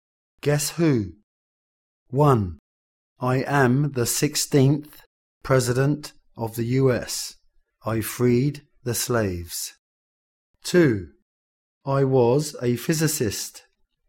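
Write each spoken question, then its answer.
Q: I am the 16th President of the US. I freed the slaves.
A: Abraham Lincoln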